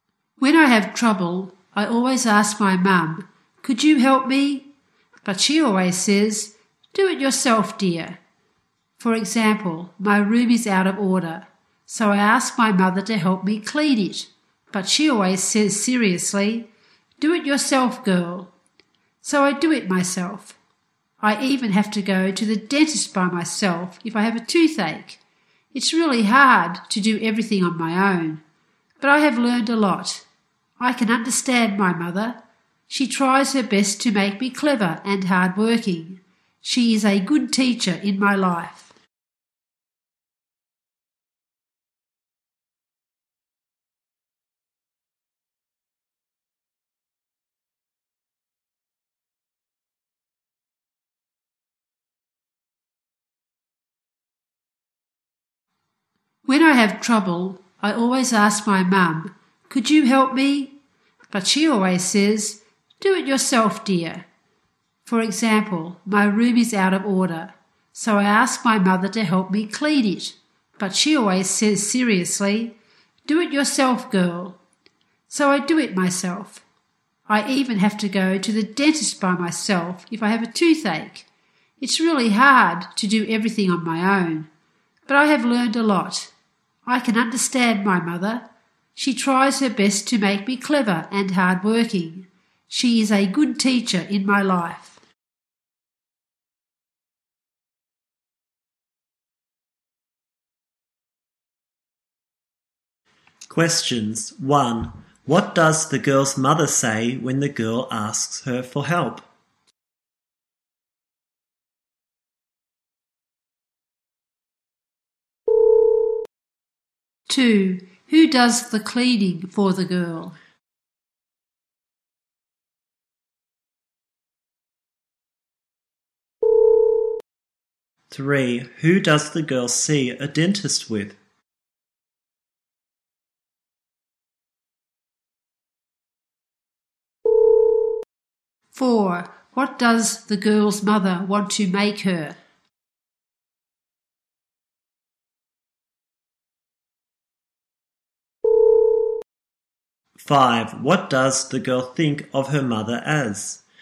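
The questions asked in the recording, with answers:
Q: What does the girl's mother say when the girl asks her for help?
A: Do it yourself

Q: Who does the cleaning for the girl?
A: She does it herself

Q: Who does the girl see a dentist with?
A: Nobody; she goes by herself

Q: What does the girl's mother want to make her?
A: Clever and hard-working

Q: What does the girl think of her mother as?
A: A good teacher in her life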